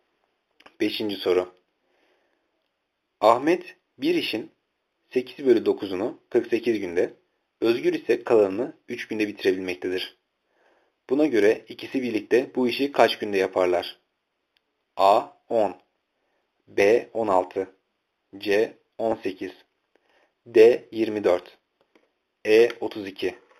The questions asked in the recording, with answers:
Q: Buna göre ikisi birlikte bu işi kaç günde yaparlar?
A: Cevap C 18.